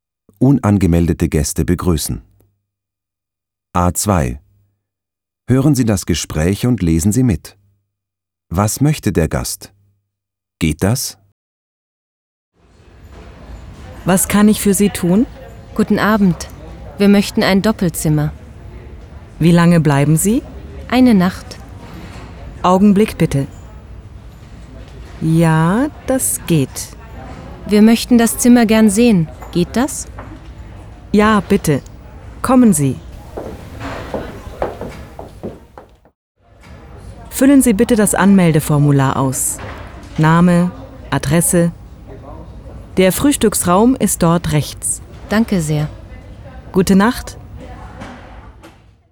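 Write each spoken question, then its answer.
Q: Was möchte der Gast?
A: Ein Doppelzimmer für eine Nacht (und das Zimmer sehen).

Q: Geht das?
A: Ja, das geht.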